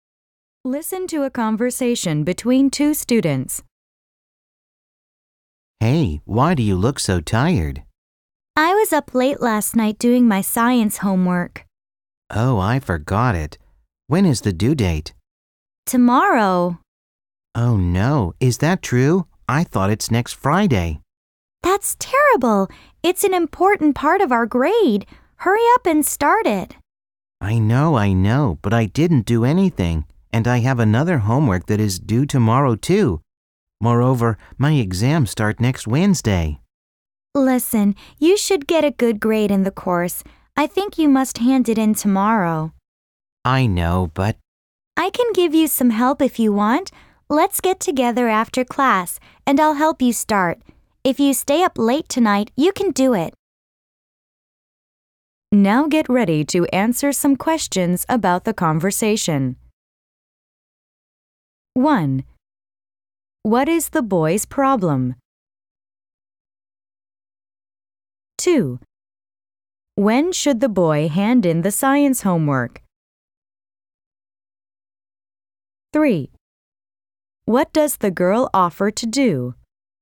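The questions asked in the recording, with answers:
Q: What is the boy's problem?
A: He forgot his science homework, which is due tomorrow

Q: When should the boy hand in the science homework?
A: Tomorrow

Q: What does the girl offer to do?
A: Help him start the homework after class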